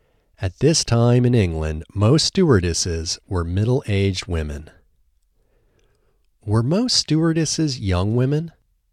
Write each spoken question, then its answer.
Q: Were most stewardesses young women?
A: No, most stewardesses weren't young women.